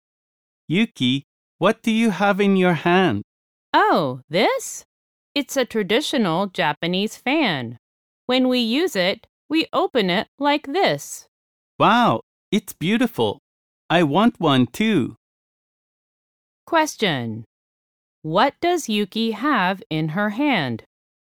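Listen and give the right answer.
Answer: A traditional Japanese fan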